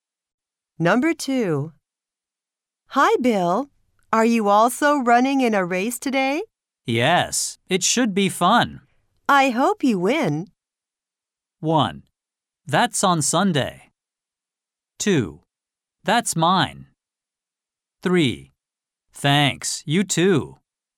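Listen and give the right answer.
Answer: 3: Thanks, you too.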